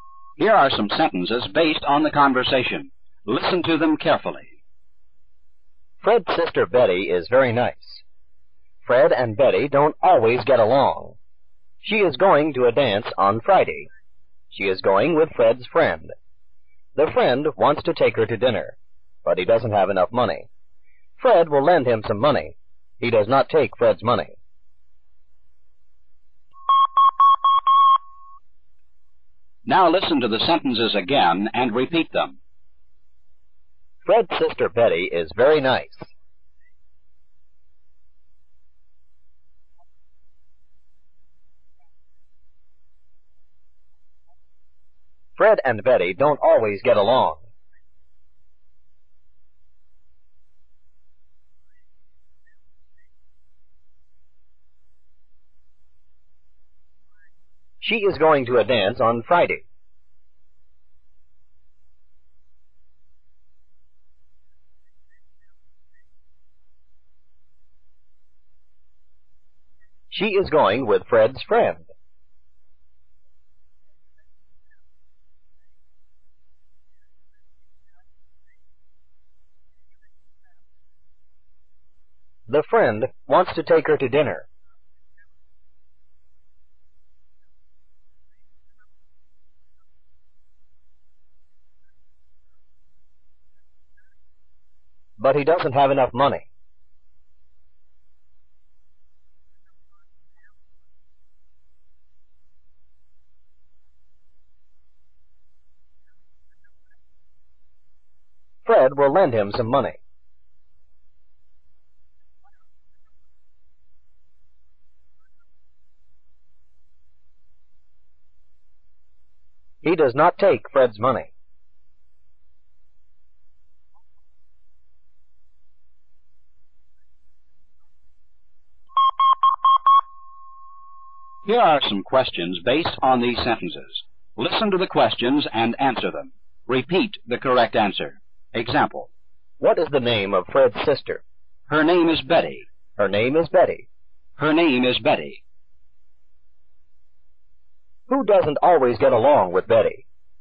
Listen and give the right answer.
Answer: Fred doesn't always get along with Betty.